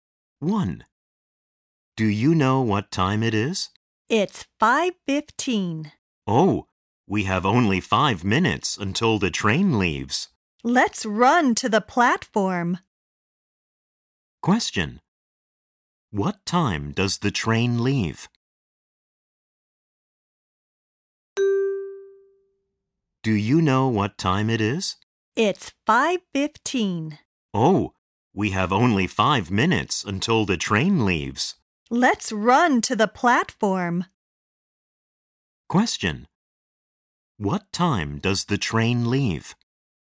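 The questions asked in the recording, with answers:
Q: What time does the train leave?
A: At 5:20.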